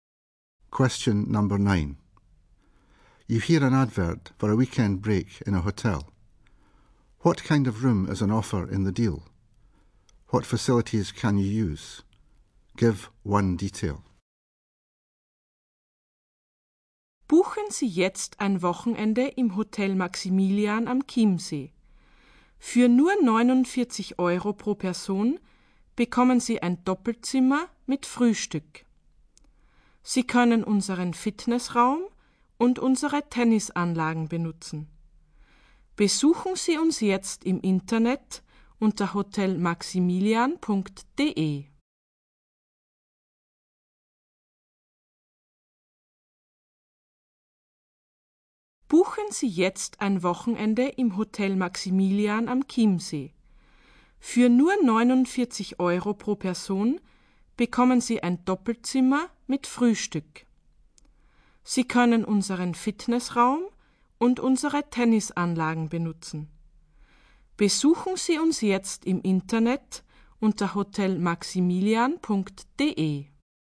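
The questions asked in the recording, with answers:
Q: What kind of room is on offer in the deal?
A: A double room with breakfast

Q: What facilities can you use?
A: The fitness room and the tennis courts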